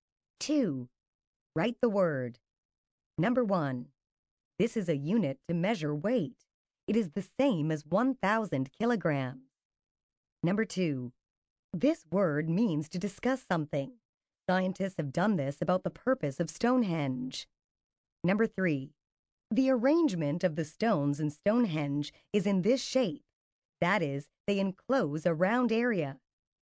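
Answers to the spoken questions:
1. ton
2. debate
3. circular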